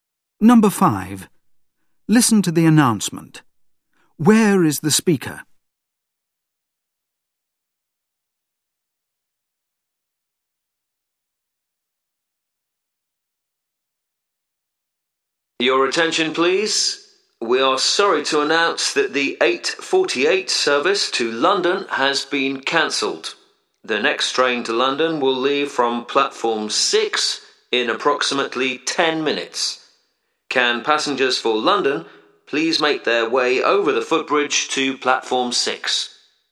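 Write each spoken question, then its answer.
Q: Where is the speaker?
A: At a train station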